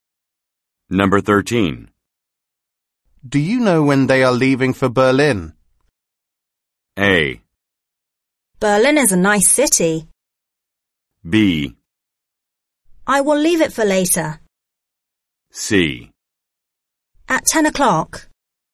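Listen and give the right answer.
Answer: C: At 10 o'clock.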